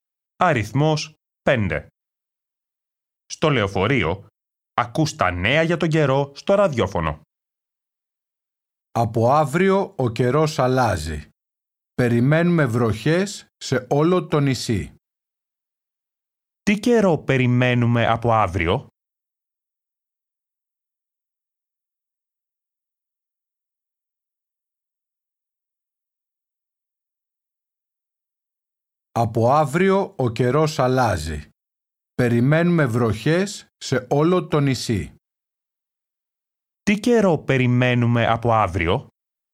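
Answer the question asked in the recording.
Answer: βροχές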